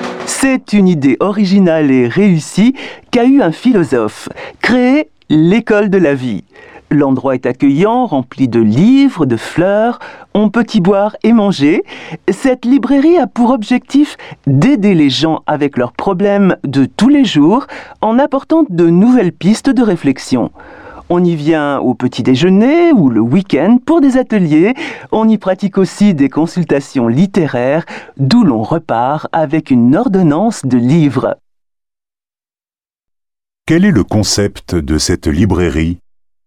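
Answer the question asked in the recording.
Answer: Aider les gens avec leurs problèmes de tous les jours en apportant de nouvelles pistes de réflexion (une école de la vie)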